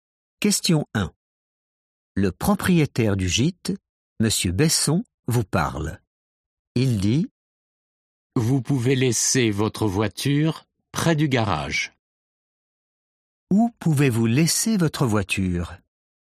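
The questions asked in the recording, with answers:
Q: Où pouvez-vous laisser votre voiture?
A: près du garage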